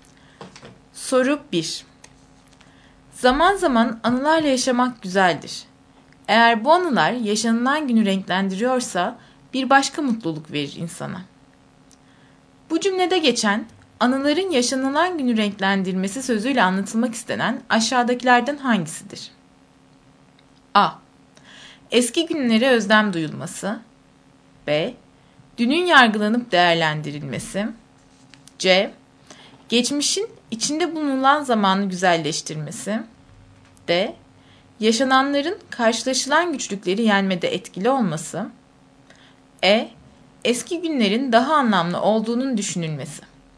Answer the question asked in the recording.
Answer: Doğru cevap C.